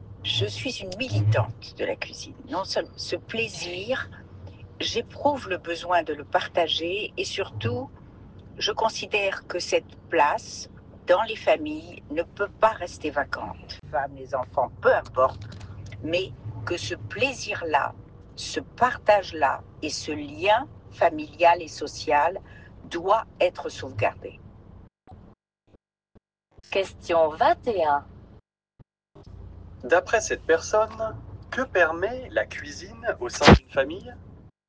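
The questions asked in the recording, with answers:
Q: D'après cette personne, que permet la cuisine au sein d'une famille ?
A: Le partage et la préservation du lien familial et social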